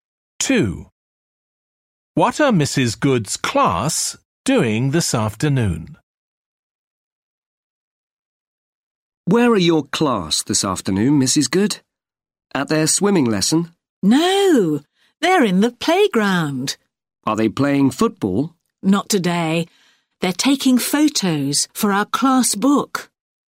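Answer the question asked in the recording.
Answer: Taking photos for their class book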